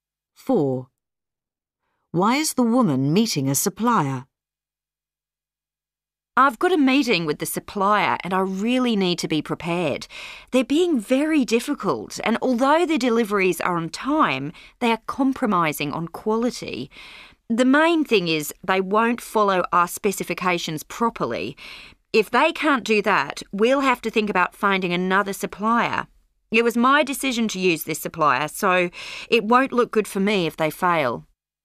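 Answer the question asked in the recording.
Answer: They won't follow the specifications properly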